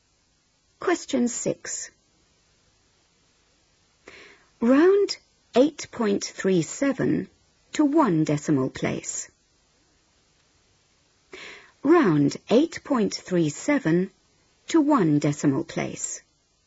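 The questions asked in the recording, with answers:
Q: Round 8.37 to one decimal place.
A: 8.4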